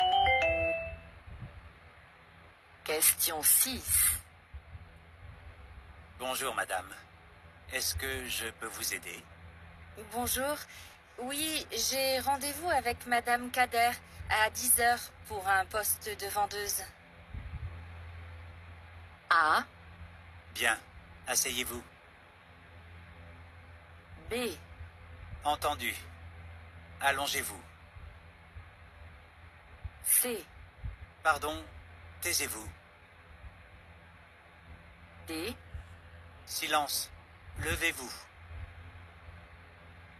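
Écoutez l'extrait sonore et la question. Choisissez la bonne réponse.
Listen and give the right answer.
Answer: Bien. Asseyez-vous.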